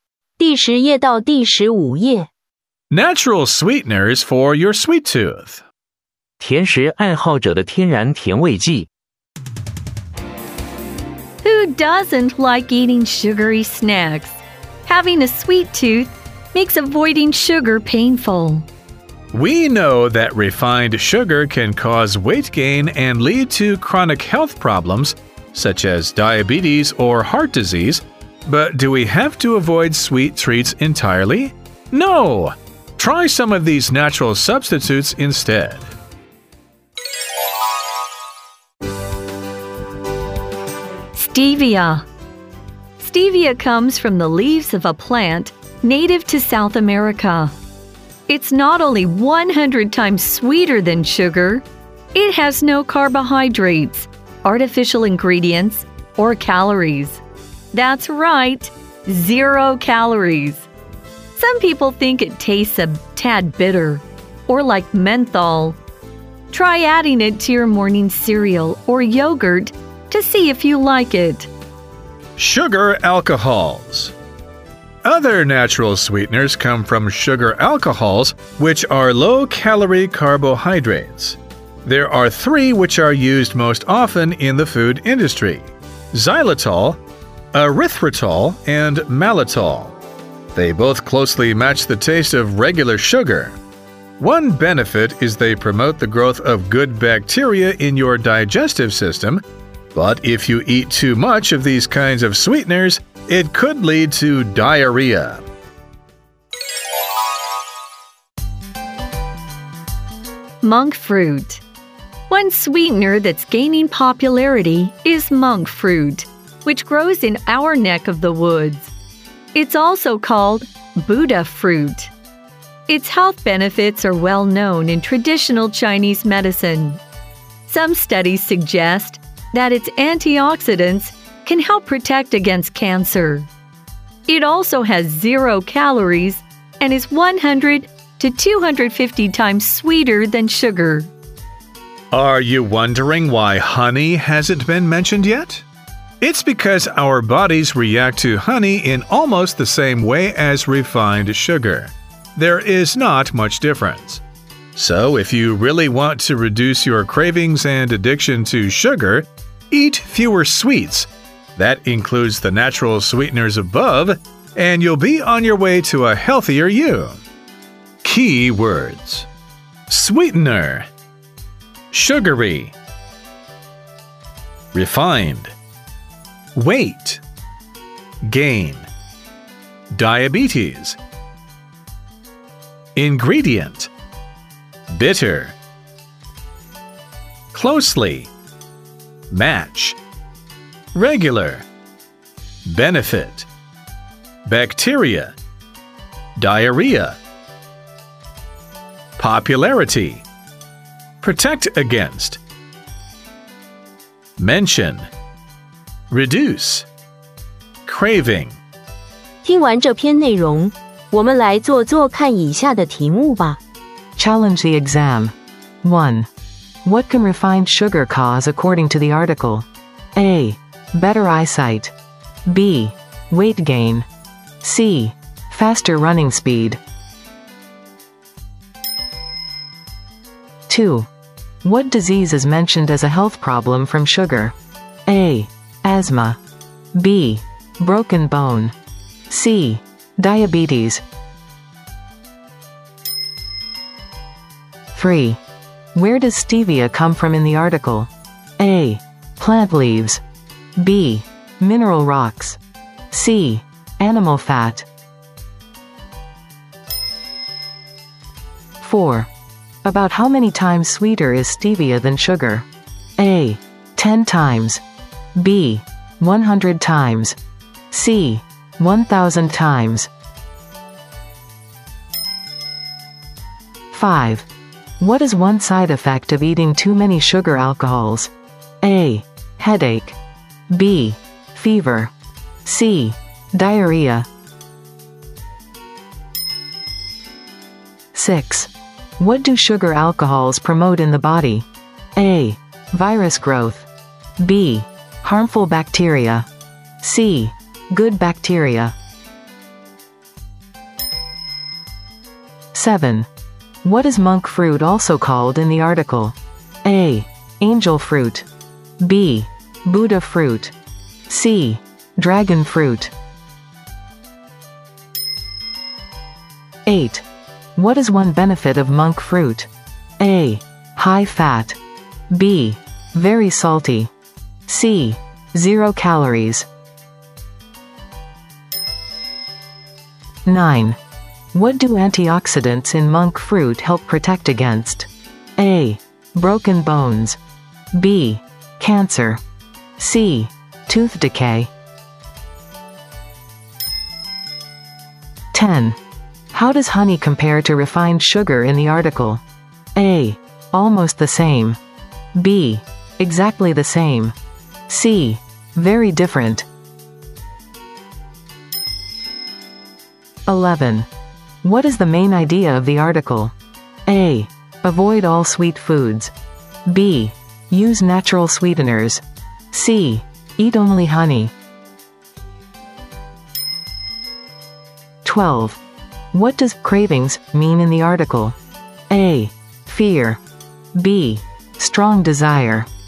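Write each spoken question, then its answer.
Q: What can refined sugar cause according to the article?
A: B: Weight gain

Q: What disease is mentioned as a health problem from sugar?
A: C: Diabetes

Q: Where does stevia come from in the article?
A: A: Plant leaves

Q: About how many times sweeter is stevia than sugar?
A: B: 100 times

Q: What is one side effect of eating too many sugar alcohols?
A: C: Diarrhea

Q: What do sugar alcohols promote in the body?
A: C: Good bacteria

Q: What is monk fruit also called in the article?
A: B: Buddha fruit

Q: What is one benefit of monk fruit?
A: C: Zero calories

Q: What do antioxidants in monk fruit help protect against?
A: B: Cancer

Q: How does honey compare to refined sugar in the article?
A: A: Almost the same

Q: What is the main idea of the article?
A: B: Use natural sweeteners

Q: What does cravings mean in the article?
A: B: Strong desire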